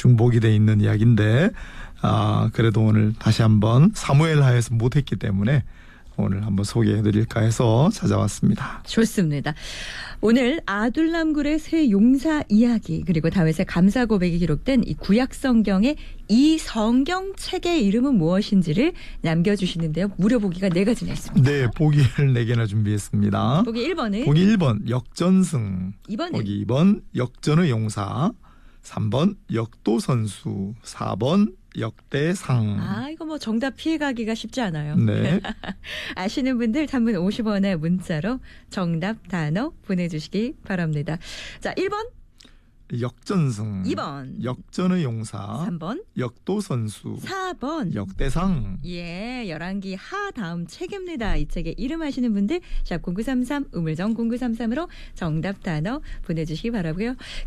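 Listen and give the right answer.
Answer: 4: 역대상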